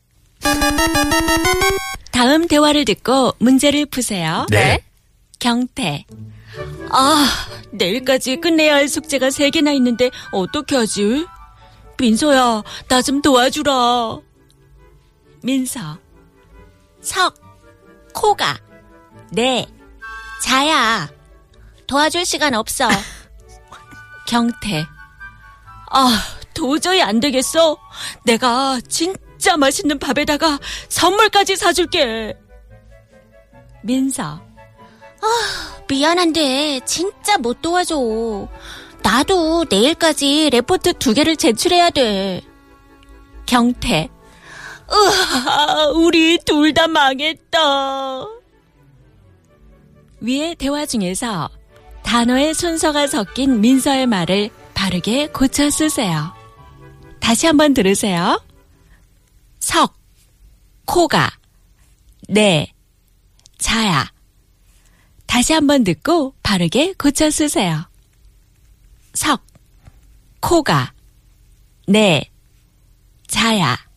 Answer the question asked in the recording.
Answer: And the proper term is 내 코가 석 자야.